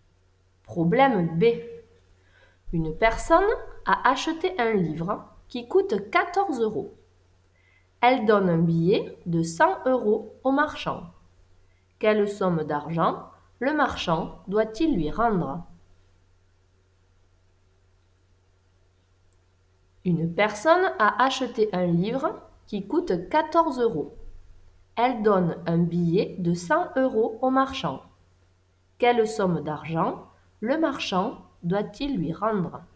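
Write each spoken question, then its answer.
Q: Quelle somme d'argent le marchand doit-il lui rendre?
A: 86 euros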